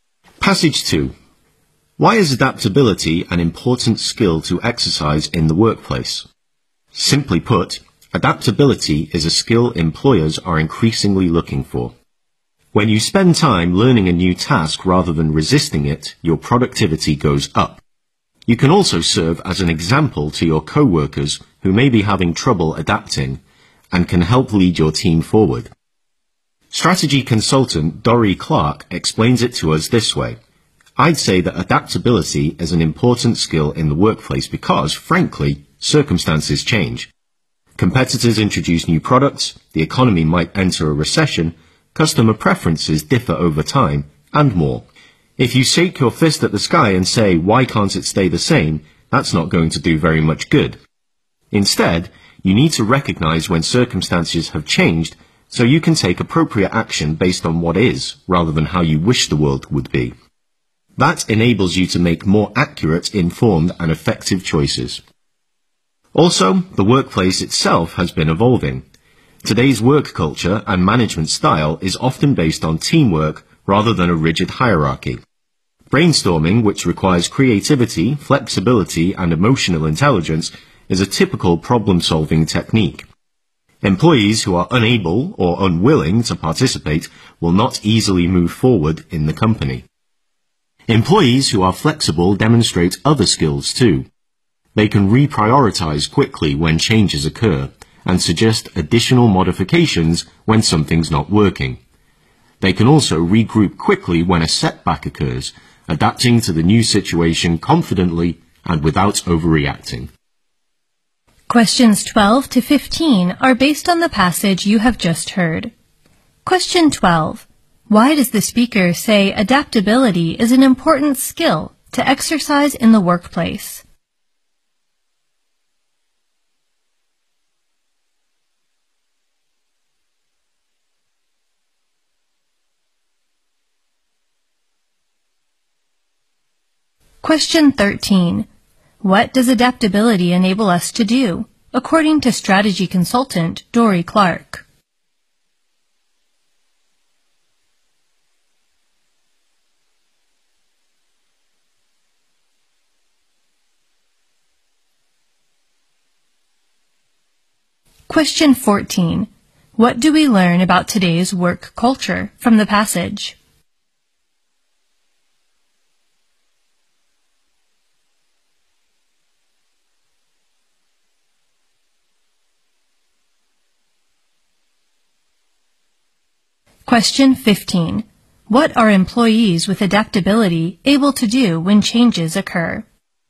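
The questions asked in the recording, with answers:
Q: Why does the speaker say adaptability is an important skill to exercise in the workplace?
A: Employers are increasingly looking for it.

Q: What does adaptability enable us to do, according to strategy consultant Dori Clark?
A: Make more accurate, informed and effective choices.

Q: What do we learn about today's work culture from the passage?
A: It is often based on teamwork rather than a rigid hierarchy.

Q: What are employees with adaptability able to do when changes occur?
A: Reprioritize quickly.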